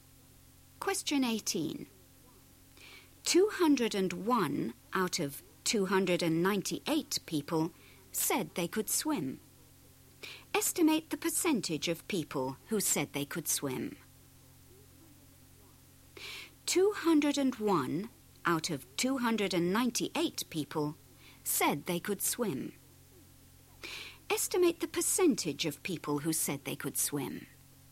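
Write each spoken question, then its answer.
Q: Estimate the percentage of people who said they could swim.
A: about 67%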